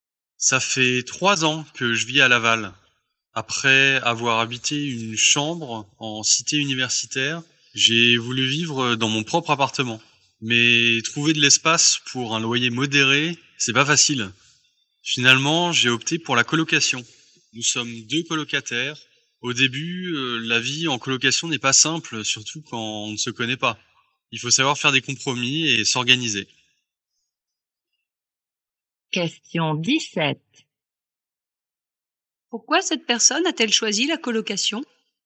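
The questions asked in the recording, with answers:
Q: Pourquoi cette personne a-t-elle choisi la colocation?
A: Parce que trouver de l'espace pour un loyer modéré n'est pas facile.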